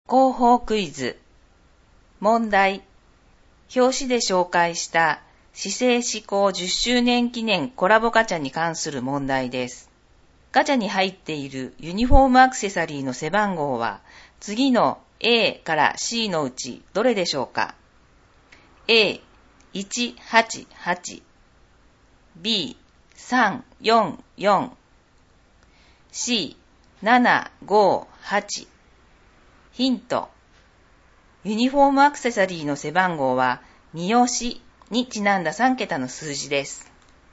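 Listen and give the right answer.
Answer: B: 344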